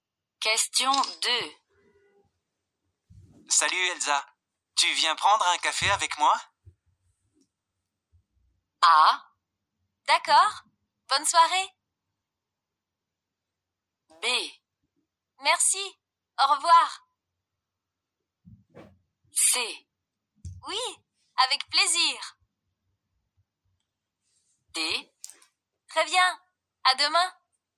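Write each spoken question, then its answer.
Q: Salut Elsa, tu viens prendre un café avec moi?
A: C: Oui, avec plaisir.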